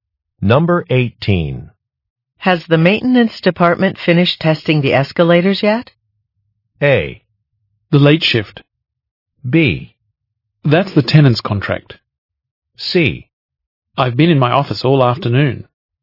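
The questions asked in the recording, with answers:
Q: Has the maintenance department finished testing the escalators yet?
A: C: I've been in my office all afternoon.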